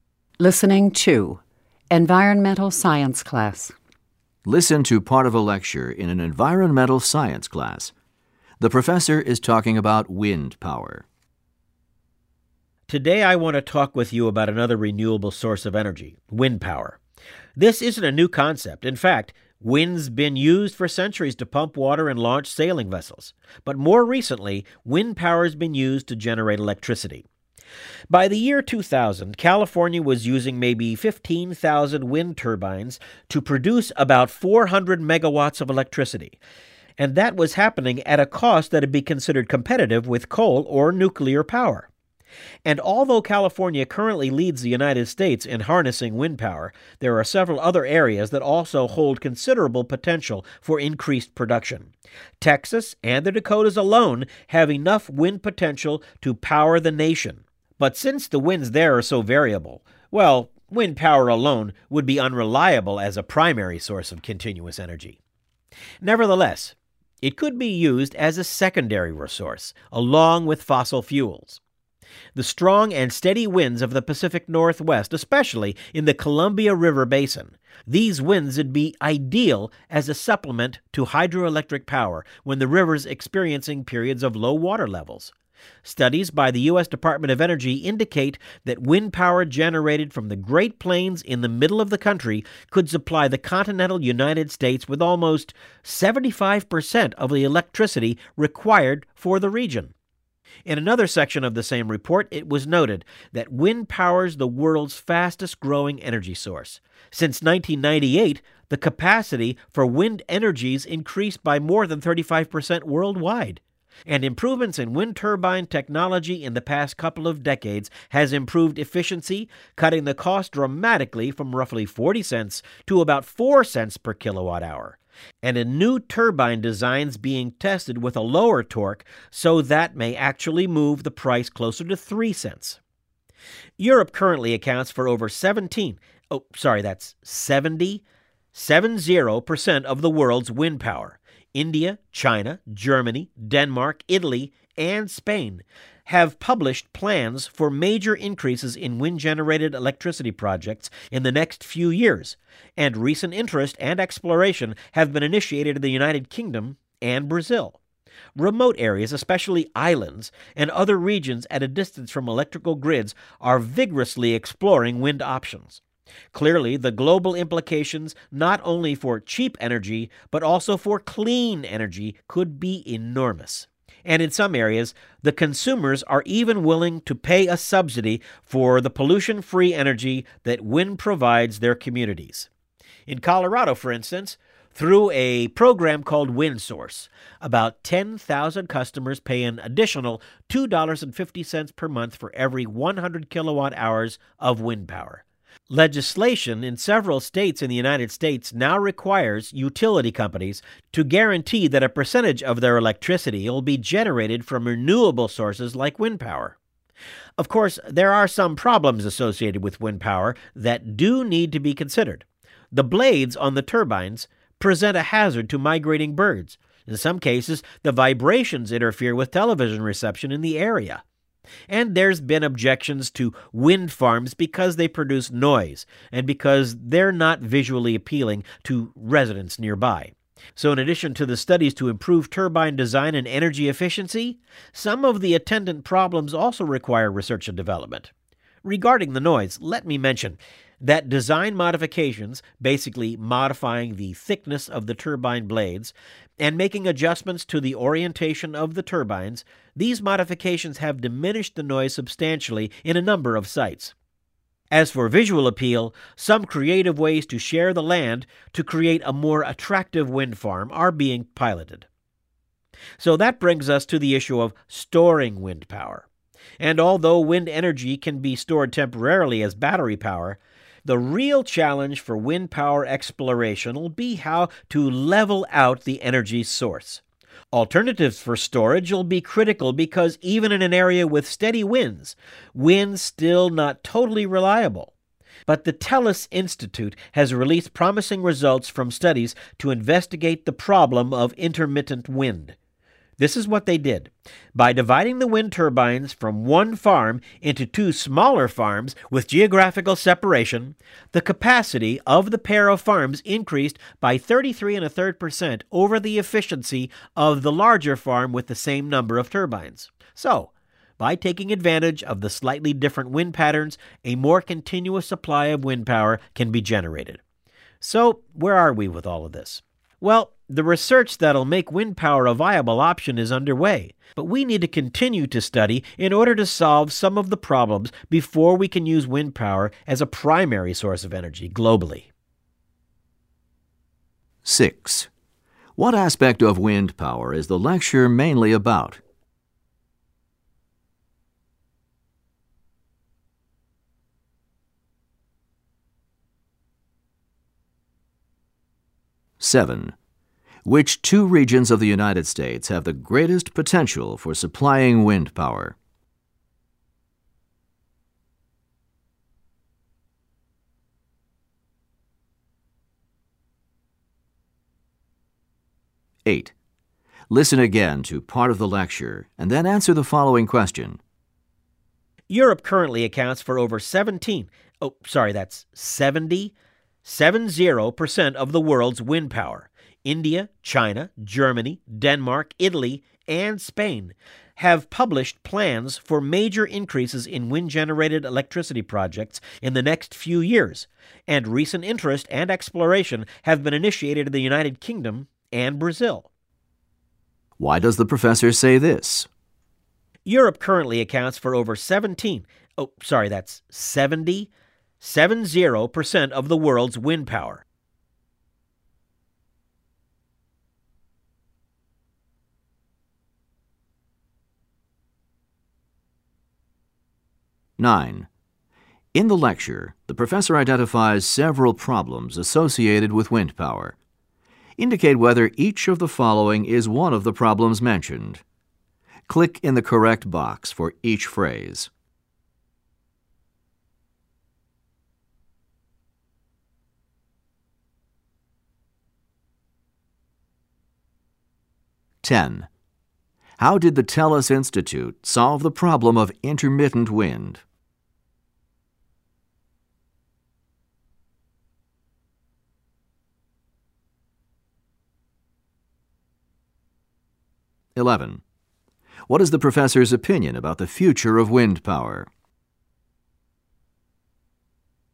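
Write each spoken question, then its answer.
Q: How did the TELUS Institute solve the problem of intermittent wind?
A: By dividing one wind farm into two smaller, geographically separated farms

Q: What is the professor's opinion about the future of wind power?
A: It is promising, but more research is needed before it can be a primary energy source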